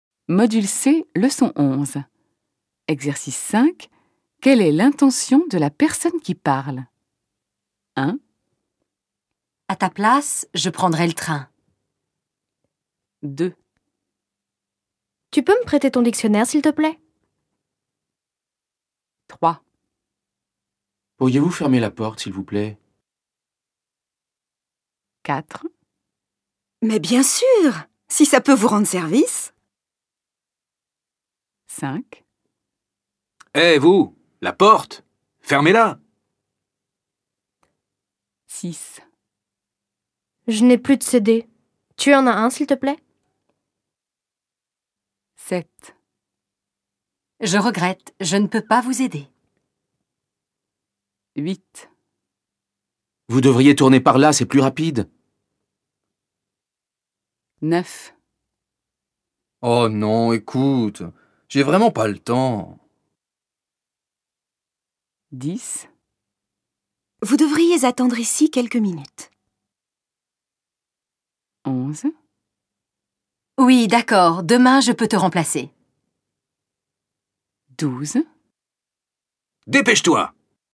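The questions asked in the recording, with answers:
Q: Quelle est l'intention de la personne qui parle ?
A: donner un conseil

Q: Quelle est l'intention de la personne qui parle ?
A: demander un service (un prêt)

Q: Quelle est l'intention de la personne qui parle ?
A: demander poliment

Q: Quelle est l'intention de la personne qui parle ?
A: accepter de rendre service

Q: Quelle est l'intention de la personne qui parle ?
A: donner un ordre

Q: Quelle est l'intention de la personne qui parle ?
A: demander quelque chose

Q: Quelle est l'intention de la personne qui parle ?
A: refuser poliment

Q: Quelle est l'intention de la personne qui parle ?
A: donner un conseil

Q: Quelle est l'intention de la personne qui parle ?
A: refuser

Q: Quelle est l'intention de la personne qui parle ?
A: accepter

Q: Quelle est l'intention de la personne qui parle ?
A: donner un ordre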